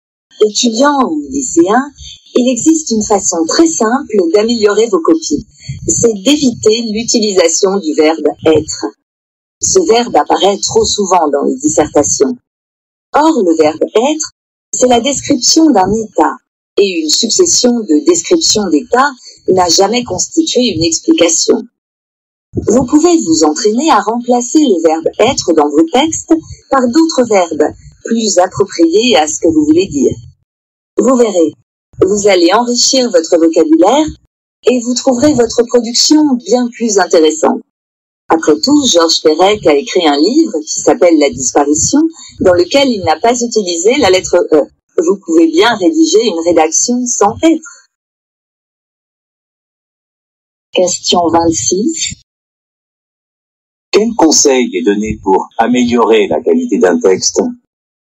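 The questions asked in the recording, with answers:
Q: Quel conseil est donné pour améliorer la qualité d'un texte ?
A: Éviter d'utiliser le verbe « être » et le remplacer par des verbes plus appropriés.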